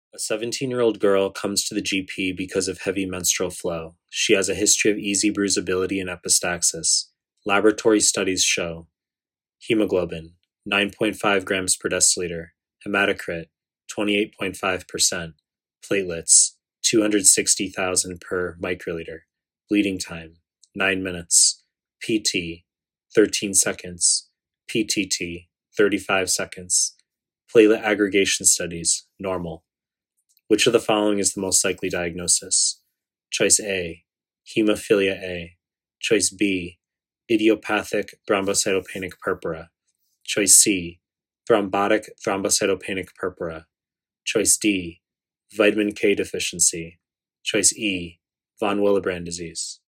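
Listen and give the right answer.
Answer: E: von Willebrand disease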